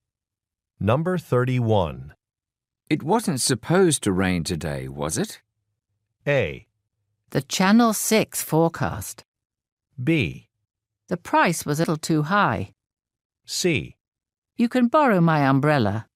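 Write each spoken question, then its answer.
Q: It wasn't supposed to rain today, was it?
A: C: You can borrow my umbrella.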